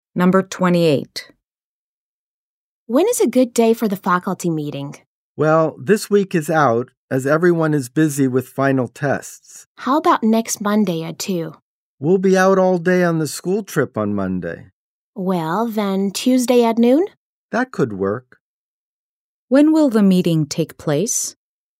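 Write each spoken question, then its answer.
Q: When will the meeting take place?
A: Next Tuesday at noon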